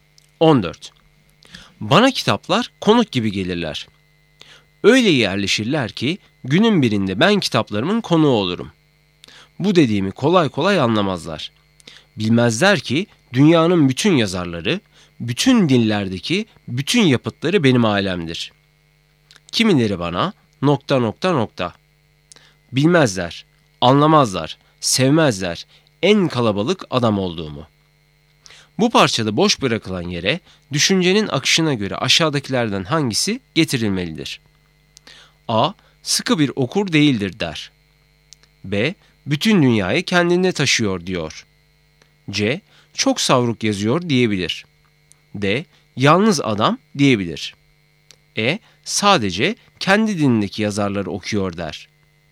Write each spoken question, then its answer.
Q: Bu parçada boş bırakılan yere düşüncenin akışına göre aşağıdakilerden hangisi getirilmelidir?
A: Doğru cevap D. Yalnız adam diyebilir.